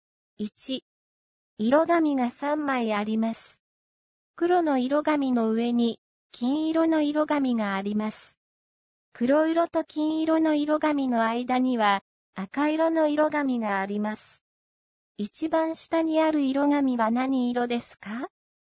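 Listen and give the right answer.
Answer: 黒色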